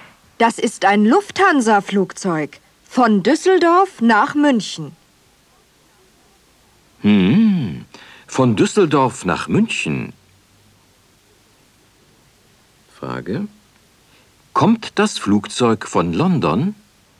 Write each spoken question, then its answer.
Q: Kommt das Flugzeug von London?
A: Nein, es kommt nicht von London.